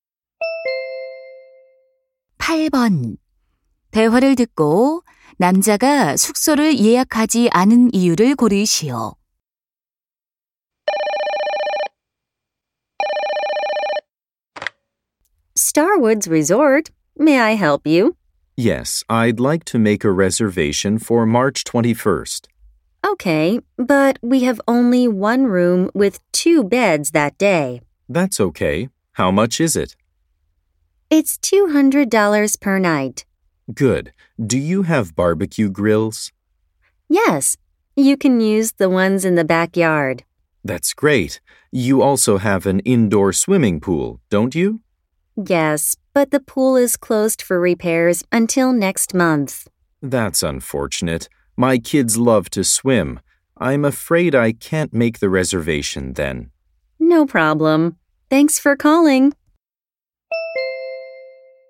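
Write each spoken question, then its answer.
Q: 대화를 듣고 남자가 숙소를 예약하지 않은 이유를 고르시오.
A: 실내 수영장이 수리 중이어서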